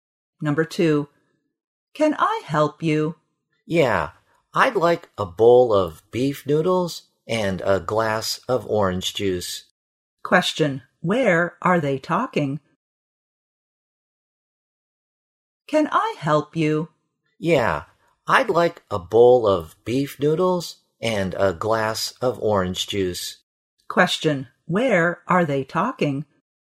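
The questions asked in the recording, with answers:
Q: where are they talking?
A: In a restaurant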